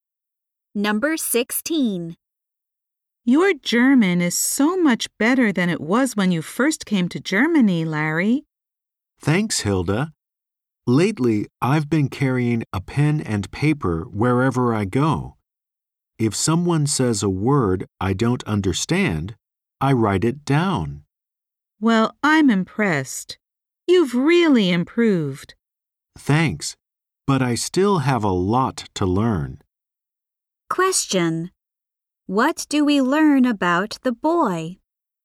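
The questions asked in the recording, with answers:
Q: What do we learn about the boy?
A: His German has improved; he writes down words he doesn't understand.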